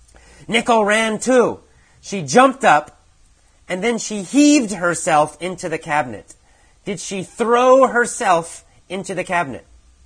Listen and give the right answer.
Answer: Yes, she did. She threw herself into the cabinet.